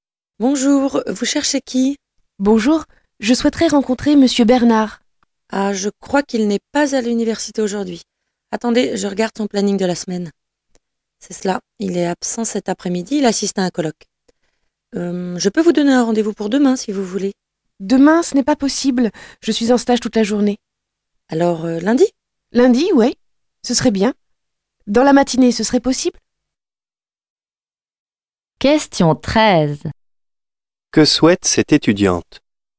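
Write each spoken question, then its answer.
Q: Que souhaite cette étudiante?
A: Rencontrer Monsieur Bernard (avoir un rendez-vous avec lui)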